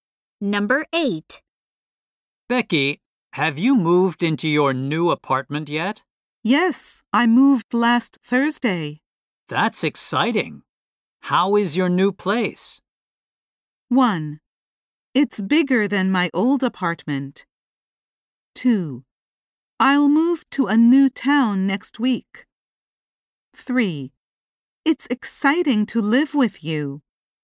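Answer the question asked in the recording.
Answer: 1: It's bigger than my old apartment.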